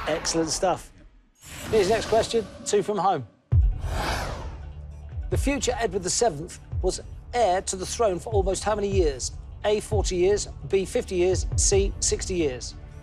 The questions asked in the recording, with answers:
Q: The future Edward VII was heir to the throne for almost how many years?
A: 60 years it is.